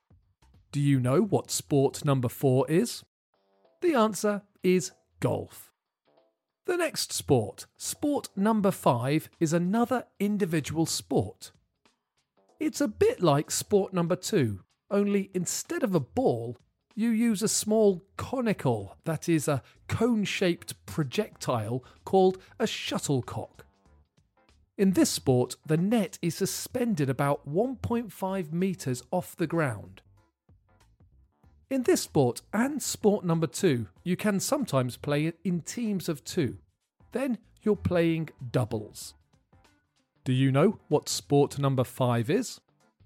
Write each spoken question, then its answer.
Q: Do you know what sport number five is?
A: The answer is badminton.